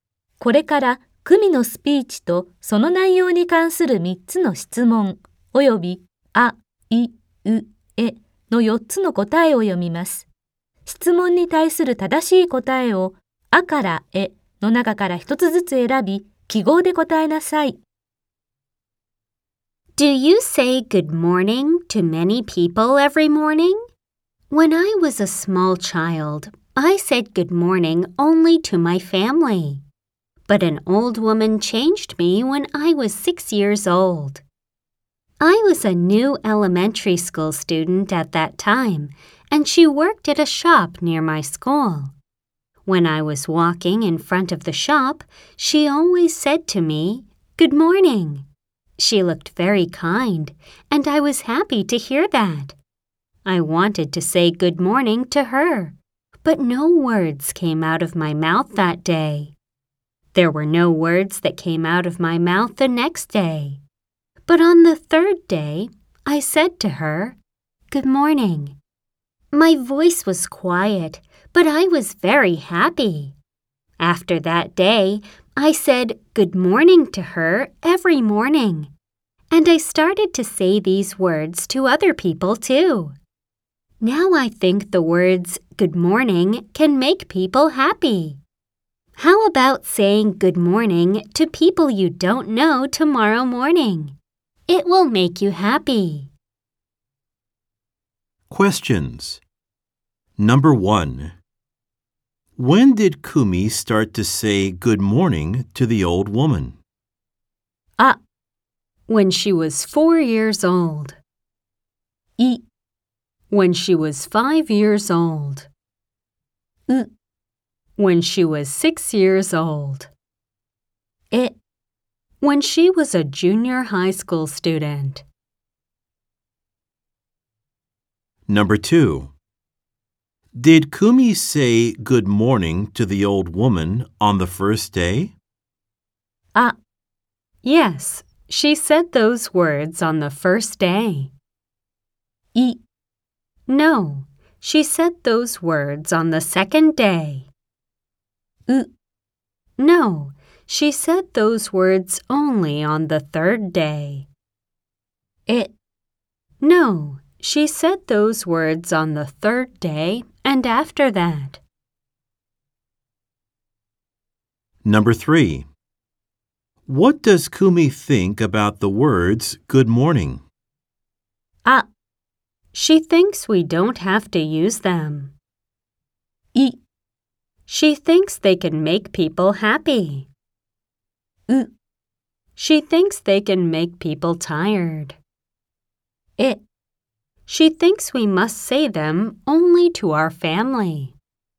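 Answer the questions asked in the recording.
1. う: When she was 6 years old.
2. え: No, she said those words on the third day and after that.
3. い: She thinks they can make people happy.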